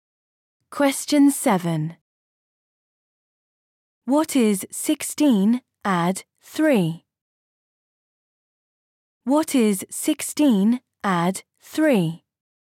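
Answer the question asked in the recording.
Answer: 19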